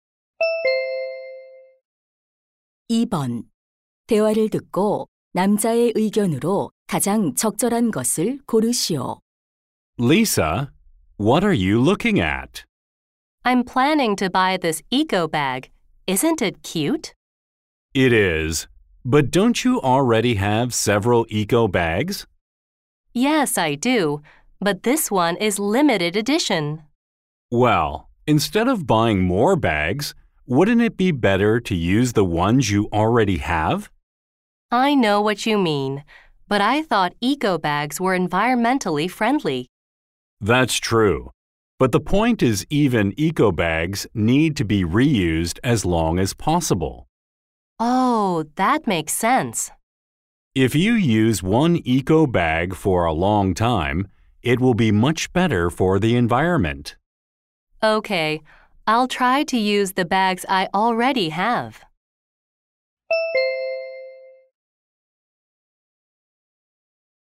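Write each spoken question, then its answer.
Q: 대화를 듣고 남자의 의견으로 가장 적절한 것을 고르시오.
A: 에코백도 새로 사기보다 가진 것을 오래 재사용해야 한다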